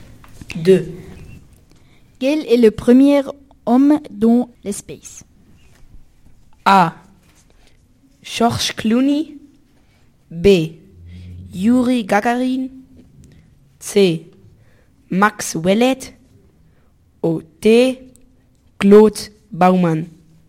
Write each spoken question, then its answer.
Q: Quel est le premier homme dans l'espace?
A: C'est B. Yuri Gagarin.